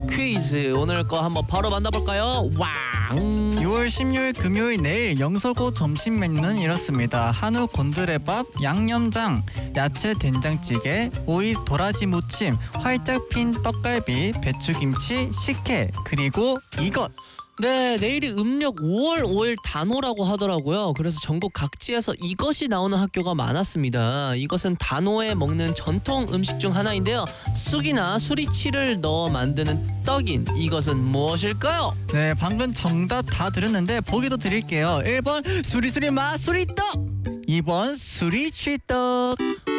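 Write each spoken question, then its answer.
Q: 쑥이나 수리치를 넣어 만드는 떡인 이것은 무엇일까요?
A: 2: 수리치떡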